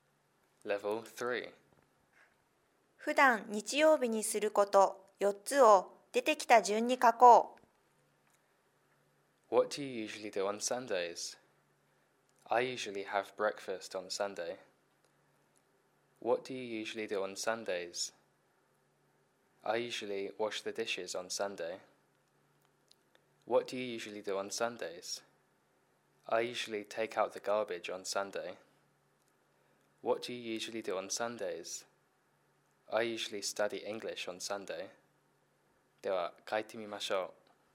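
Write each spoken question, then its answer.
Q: 普段日曜日にすること4つを出てきた順に書こう。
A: 朝食を食べる(have breakfast)、皿洗い(wash the dishes)、ごみ出し(take out the garbage)、英語の勉強(study English)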